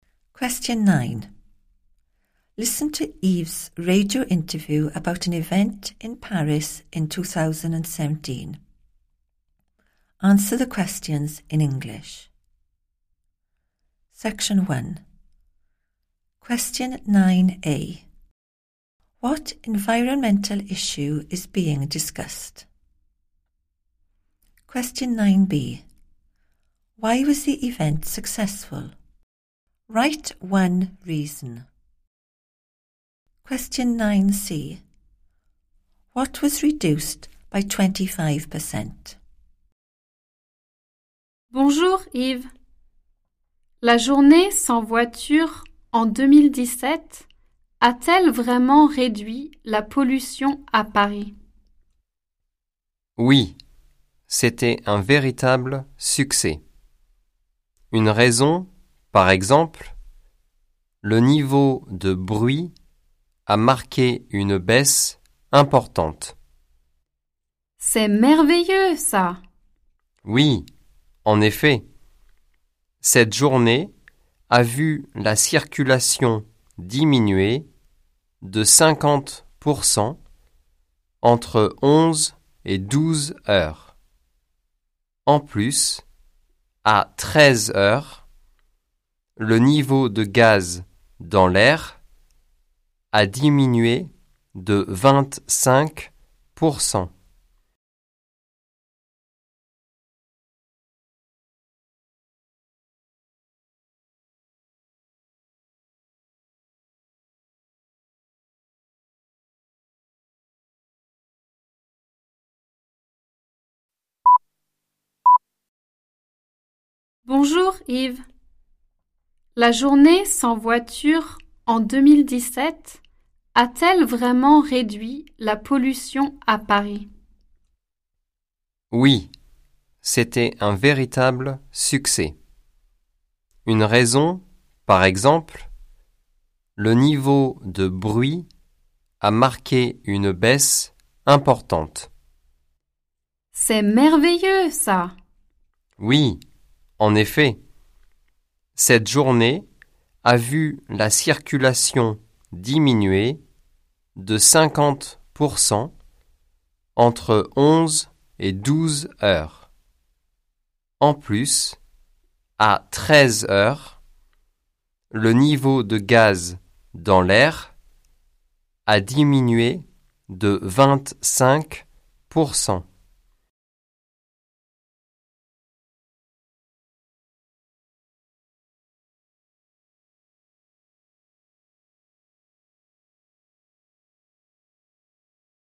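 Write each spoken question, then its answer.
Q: What environmental issue is being discussed?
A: pollution in Paris

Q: Why was the event successful?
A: noise levels fell a lot / traffic fell by 50%

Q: What was reduced by 25%?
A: the level of gas in the air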